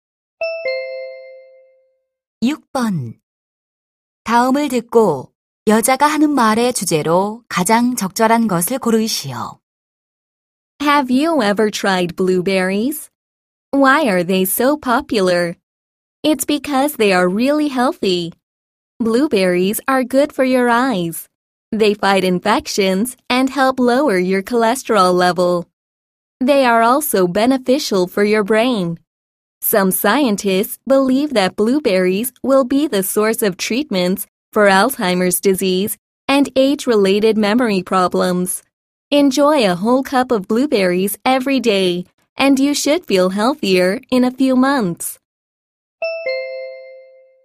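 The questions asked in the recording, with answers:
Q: 다음을 듣고 여자가 하는 말의 주제로 가장 적절한 것을 고르시오.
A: 블루베리의 건강상 이점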